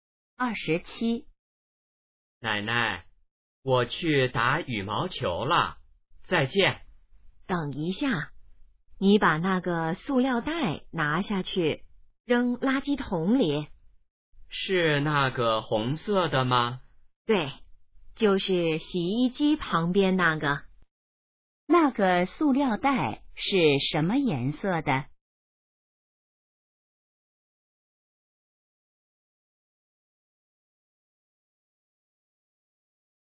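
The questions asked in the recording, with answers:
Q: 那个塑料袋是什么颜色的?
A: 红色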